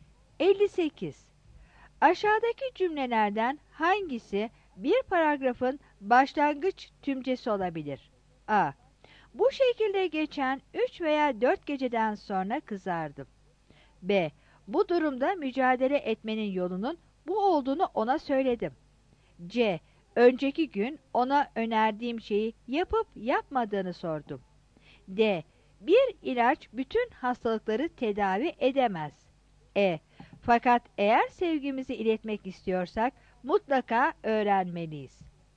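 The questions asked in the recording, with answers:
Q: Aşağıdaki cümlelerden hangisi bir paragrafın başlangıç tümcesi olabilir?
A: D: Bir ilaç bütün hastalıkları tedavi edemez.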